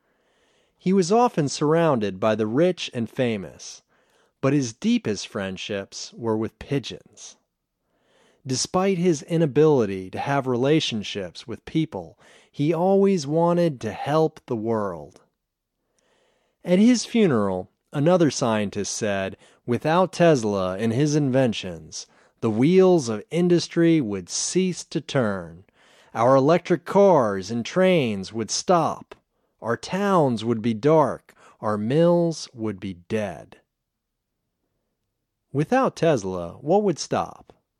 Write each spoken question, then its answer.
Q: Without Tesla, what would stop?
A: Without Tesla, our electric cars and trains would stop.